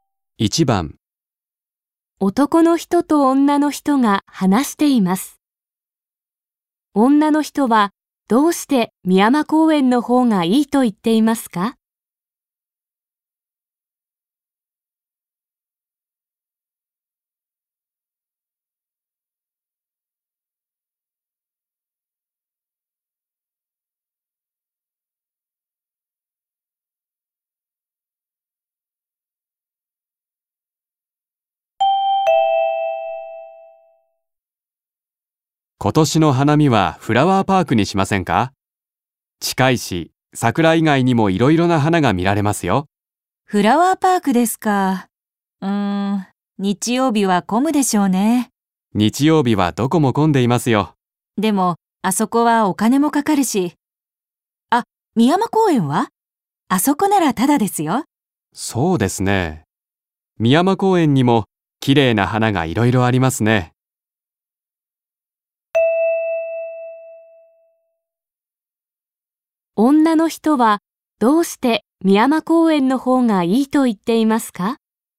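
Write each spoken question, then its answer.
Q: 女の人はどうして深山公園の方がいいと言っていますか?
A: お金がかからない(タダだ)から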